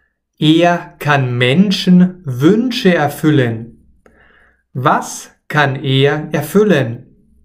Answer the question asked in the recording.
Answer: Wünsche. Er kann Wünsche erfüllen.